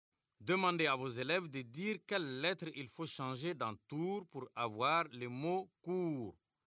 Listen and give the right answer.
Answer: Monsieur, j'efface le T et j'écris la lettre C.